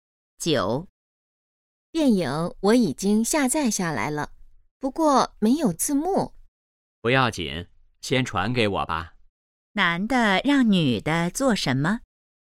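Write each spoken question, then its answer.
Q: 男的让女的做什么?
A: 先把电影传给他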